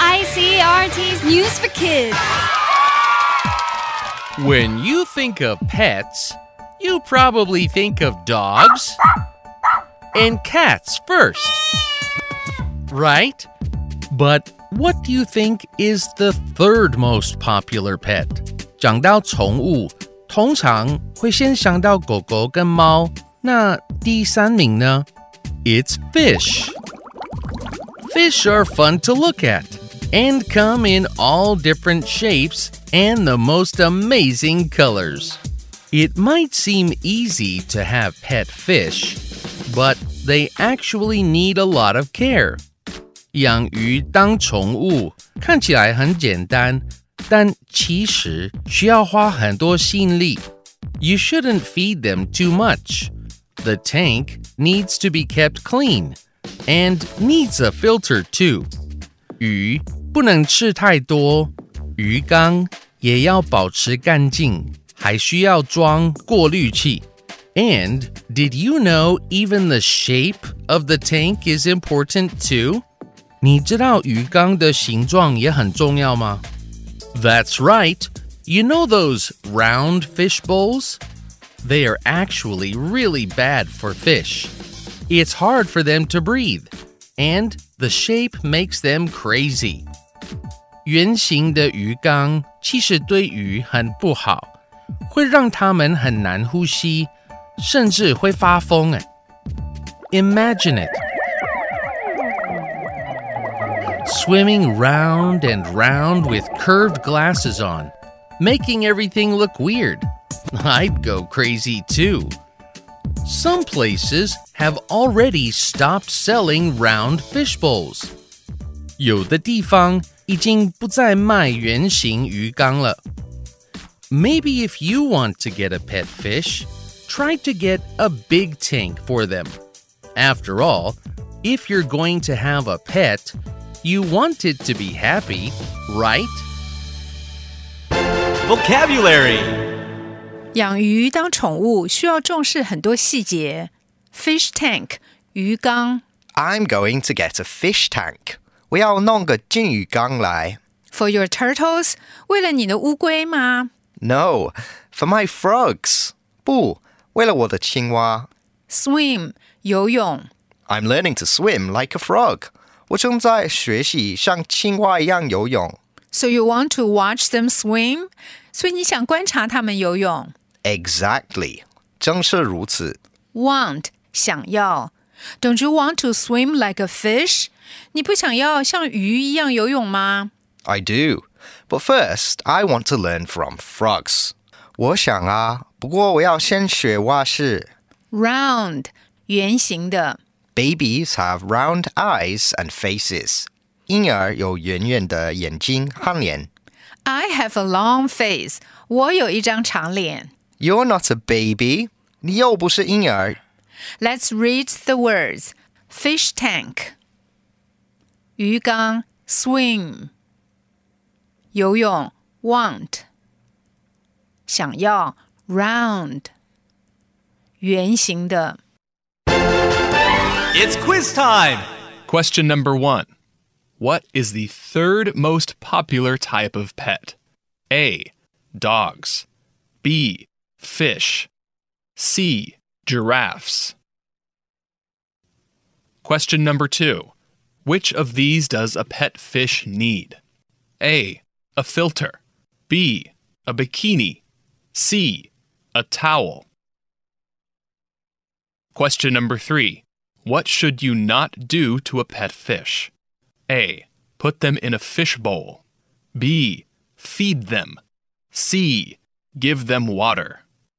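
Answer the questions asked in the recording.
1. B: Fish
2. A: A filter
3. A: Put them in a fish bowl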